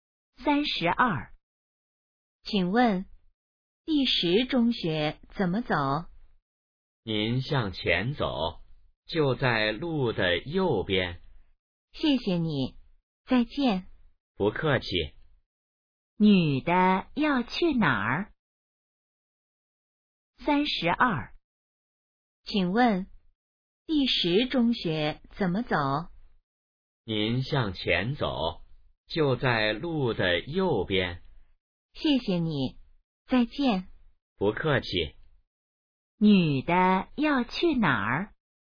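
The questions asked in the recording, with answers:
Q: 女的要去哪儿?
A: 第十中学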